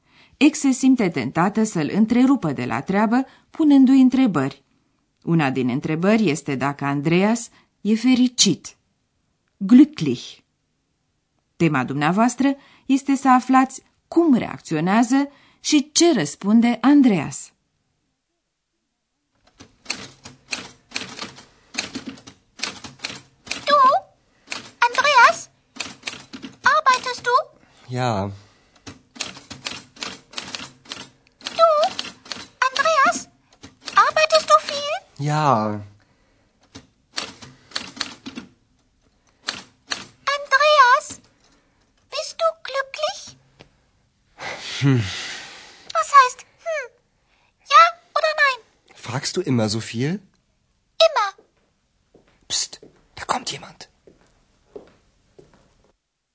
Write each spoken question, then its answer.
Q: Tema dumneavoastră este să aflați cum reacționează și ce răspunde Andreas.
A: La întrebarea dacă e fericit, Andreas mormăie ceva nehotărât și răspunde apoi tot printr-o întrebare, și anume dacă ea întreabă totdeauna atât de multe.